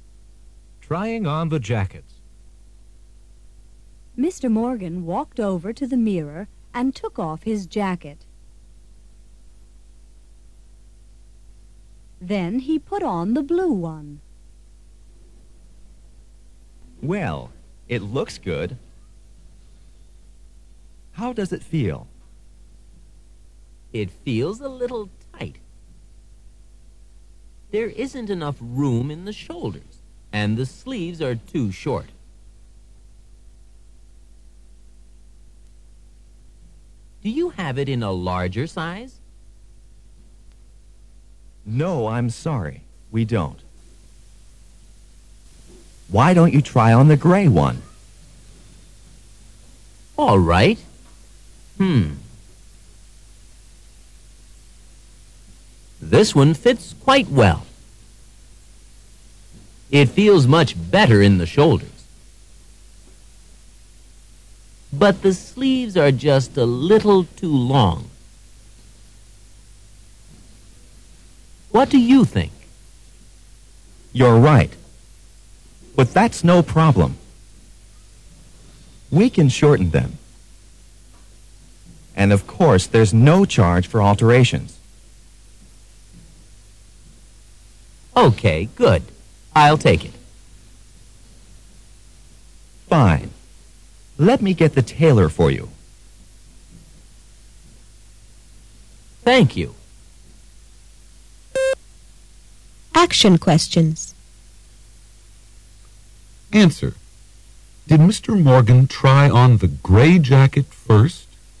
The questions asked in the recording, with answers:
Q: Did Mr. Morgan try on the gray jacket first?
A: No, he didn't.